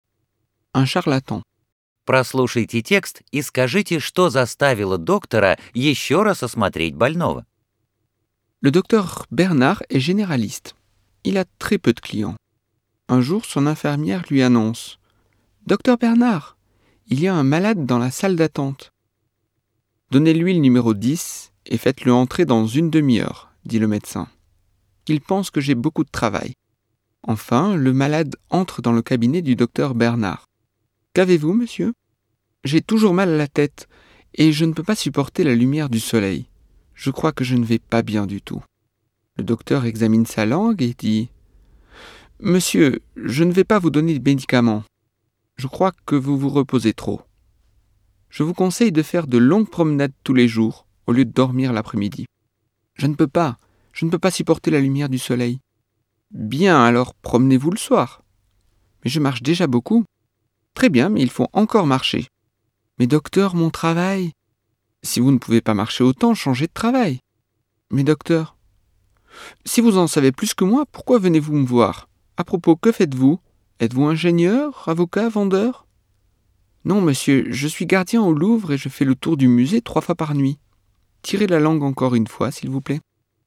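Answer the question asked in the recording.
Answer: Он узнал, что больной работает ночным сторожем в Лувре и и так много ходит (обходит музей 3 раза за ночь)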